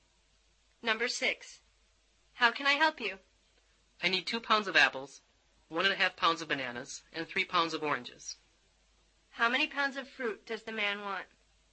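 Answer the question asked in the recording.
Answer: 6.5 pounds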